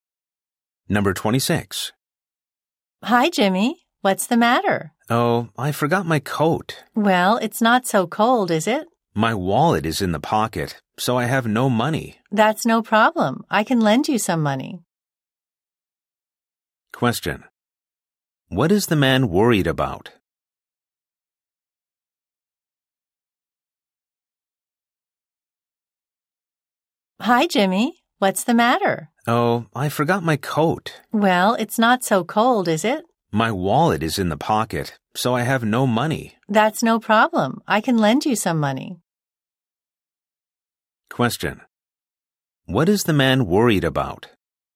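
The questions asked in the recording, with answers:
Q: What is the man worried about?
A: He has no money because his wallet is in his coat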